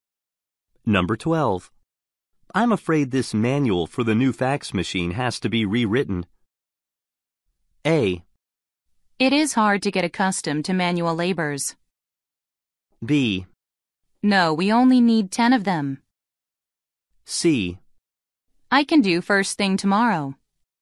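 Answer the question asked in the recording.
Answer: C: I can do first thing tomorrow.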